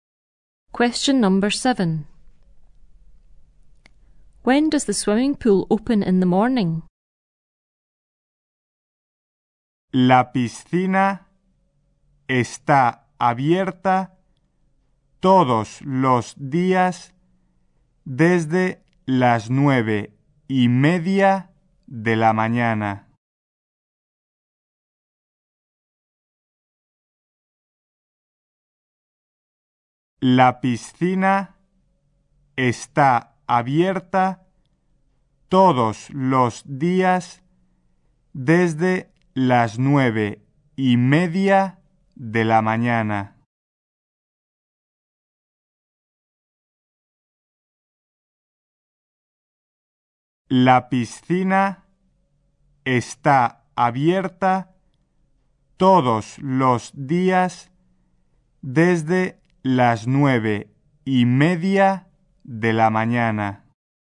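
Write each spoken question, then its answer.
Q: When does the swimming pool open in the morning?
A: 9:30 am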